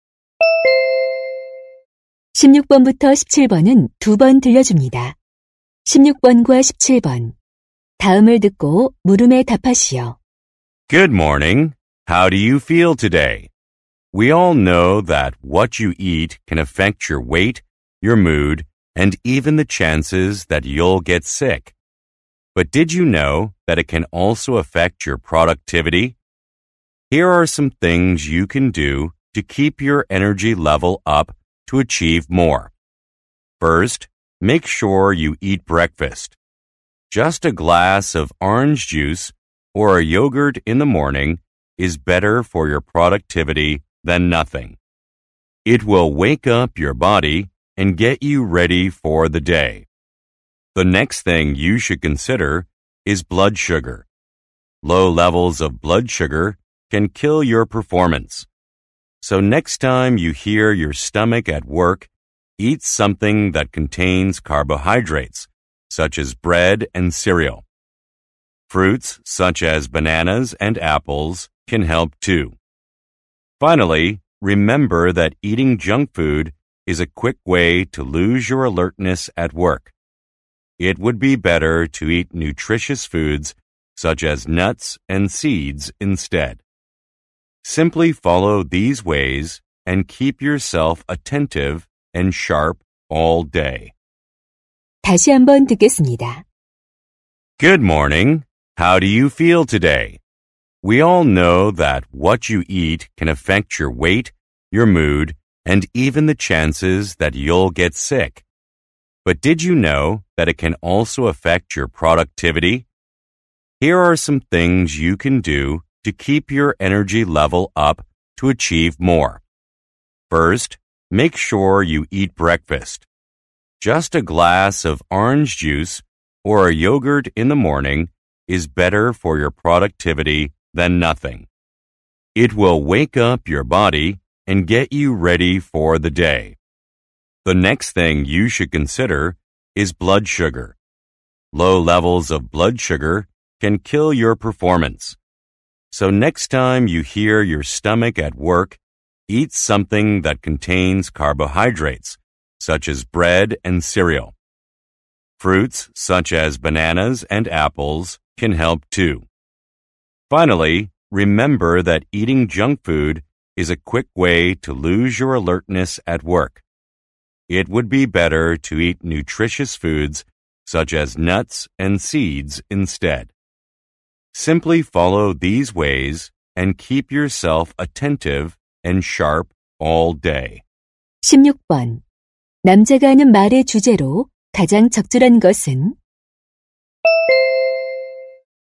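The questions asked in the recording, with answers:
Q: 남자가 하는 말의 주제로 가장 적절한 것은?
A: 업무 생산성을 높이는 식습관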